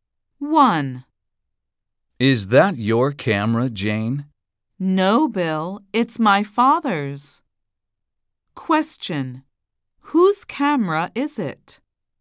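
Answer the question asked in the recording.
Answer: Jane's father's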